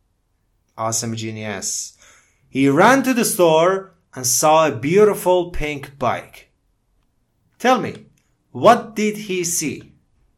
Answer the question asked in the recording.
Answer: A pink bike. He saw a pink bike.